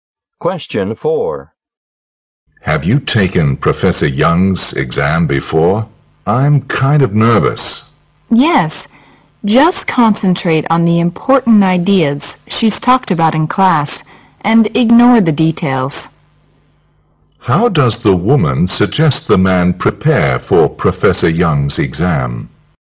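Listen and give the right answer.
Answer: Focus on the important ideas from class and ignore the details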